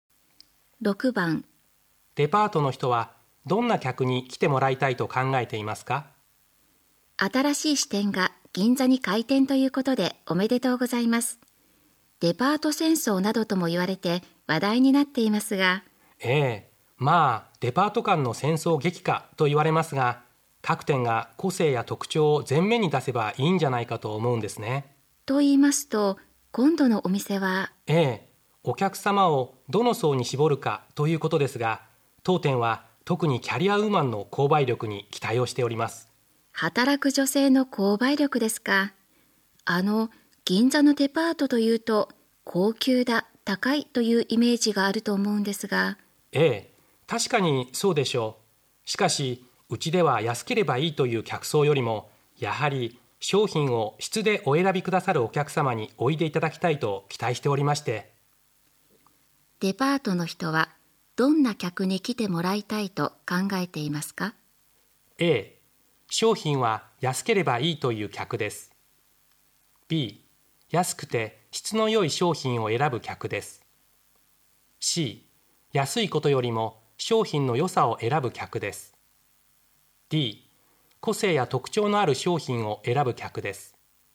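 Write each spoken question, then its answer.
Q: デパートの人はどんな客に来てもらいたいと考えていますか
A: C: 安いことよりも商品の良さを選ぶ客です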